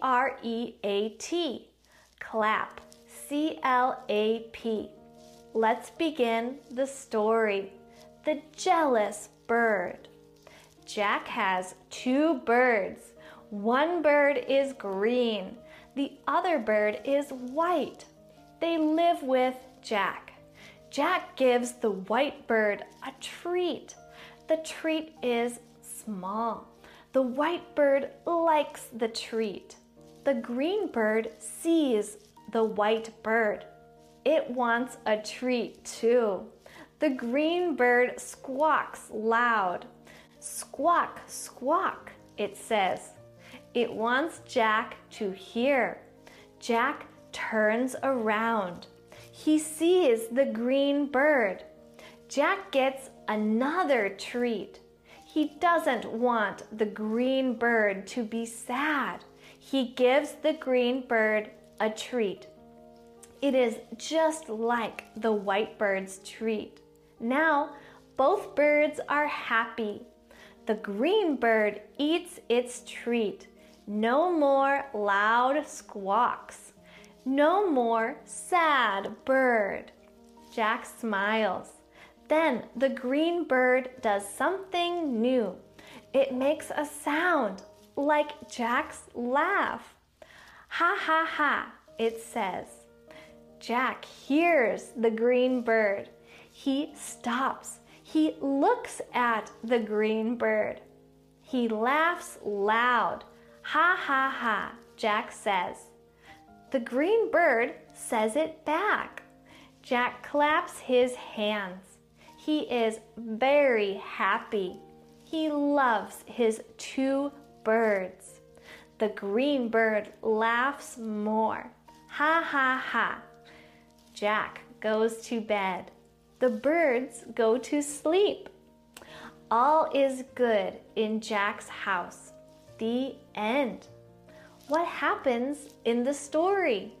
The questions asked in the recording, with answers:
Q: What happens in the story?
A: 1. The green bird is jealous. 2. Jack gives treats to both of his birds. 3. Jack laughs, and the green bird laughs too.